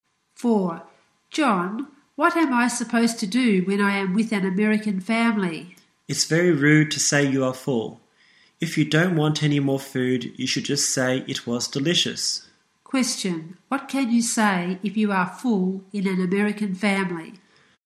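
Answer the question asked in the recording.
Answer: It was delicious.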